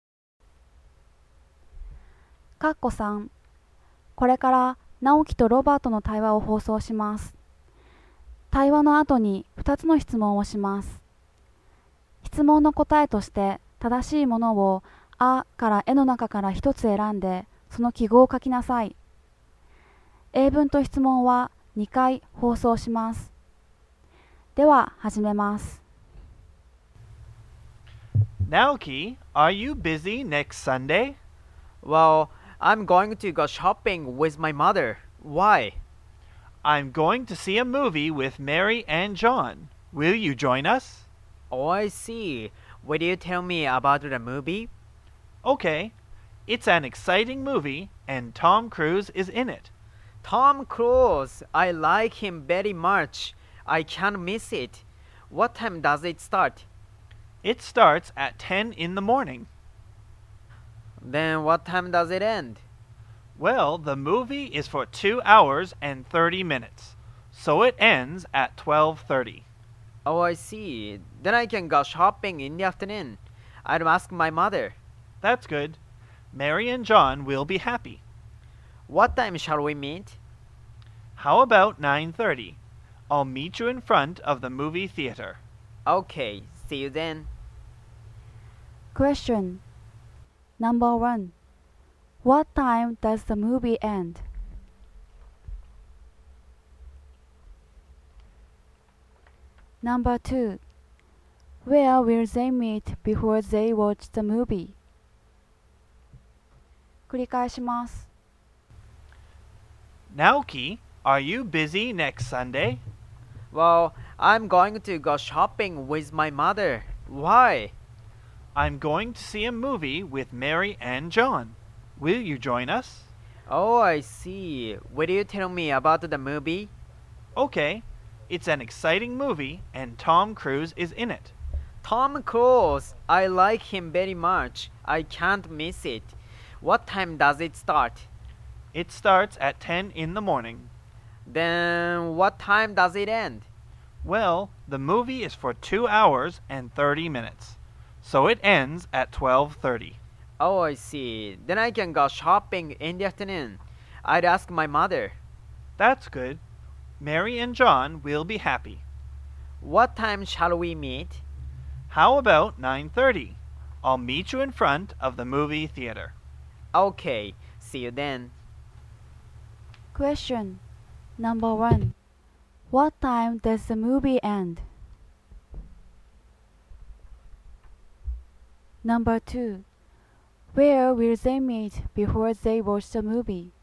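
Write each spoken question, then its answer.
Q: What time does the movie end?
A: At 12:30

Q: Where will they meet before they watch the movie?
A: In front of the movie theater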